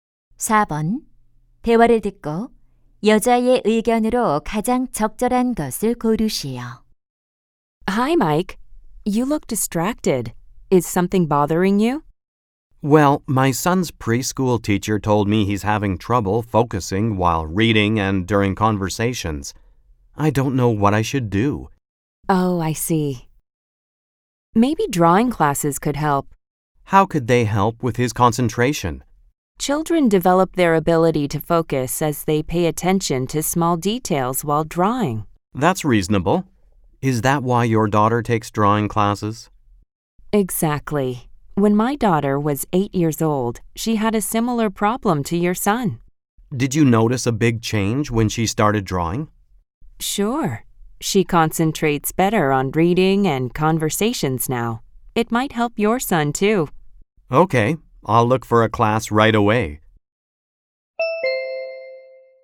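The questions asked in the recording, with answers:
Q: 대화를 듣고 여자의 의견으로 가장 적절한 것을 고르시오.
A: 그림 그리기 수업은 아이의 집중력 향상에 도움이 된다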